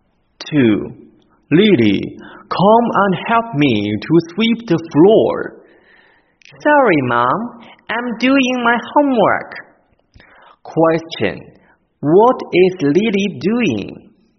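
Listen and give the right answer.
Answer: She is doing her homework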